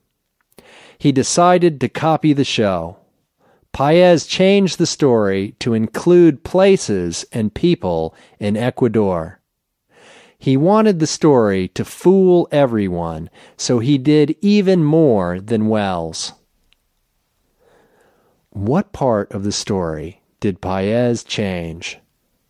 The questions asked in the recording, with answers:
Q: What part of the story did Paez change?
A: Paez changed the story to include places and people in Ecuador.